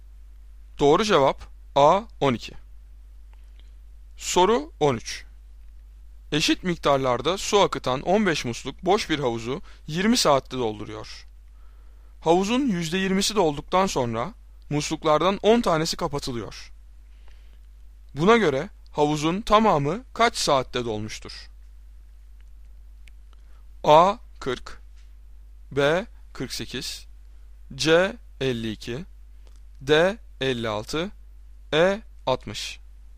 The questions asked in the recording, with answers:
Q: Buna göre havuzun tamamı kaç saatte dolmuştur?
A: Doğru cevap C 52.